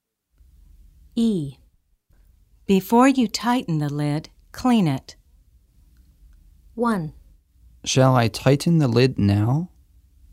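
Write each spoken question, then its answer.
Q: Shall I tighten the lid now?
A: No, clean it first.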